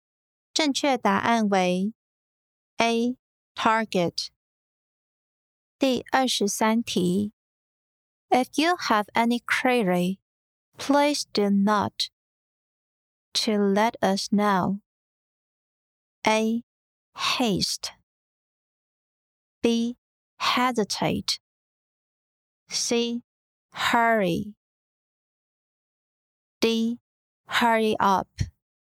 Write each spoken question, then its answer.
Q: If you have any query, please do not to let us know.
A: 正确答案为 B. Hesitate